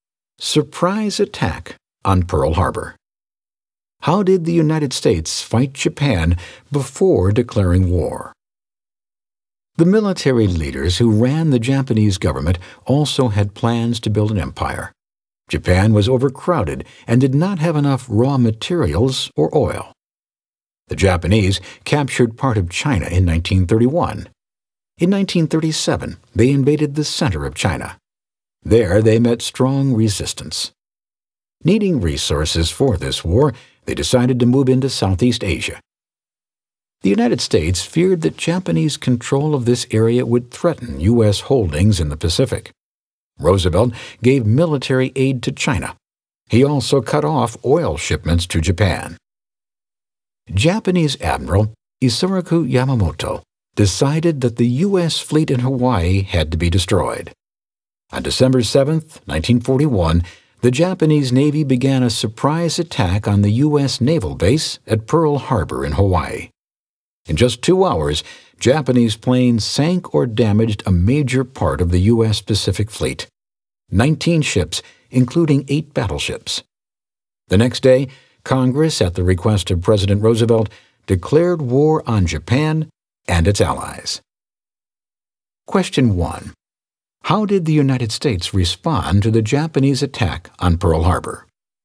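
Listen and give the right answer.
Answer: Congress declared war on Japan and its allies the next day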